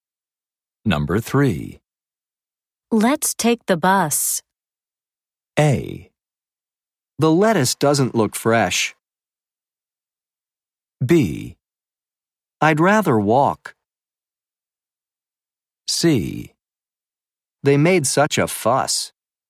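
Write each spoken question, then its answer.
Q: Let's take the bus.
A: B: I'd rather walk.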